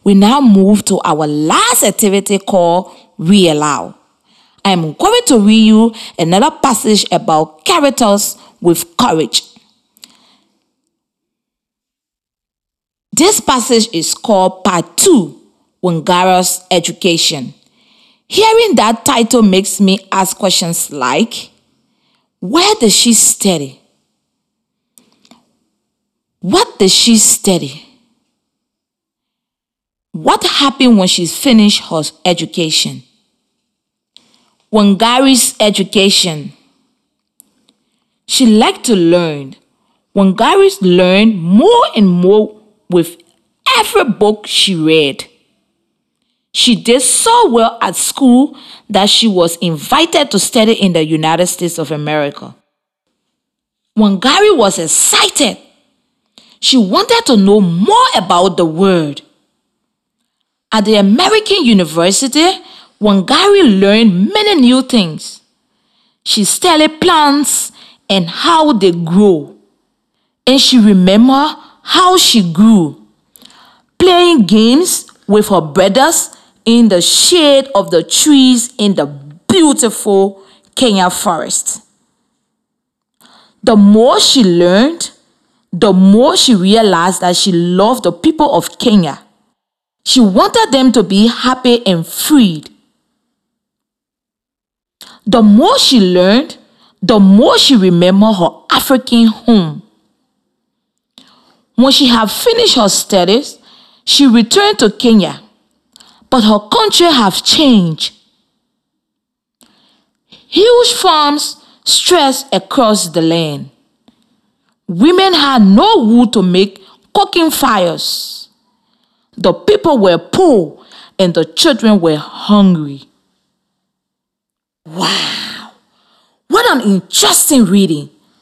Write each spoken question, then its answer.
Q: where does she study?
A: So that is where she studied.

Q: What does she study?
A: She studied plants and how they grow.

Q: What happened when she finished her education?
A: The passage tells us that after Wangari finished her studies, she went back to her home in Kenya.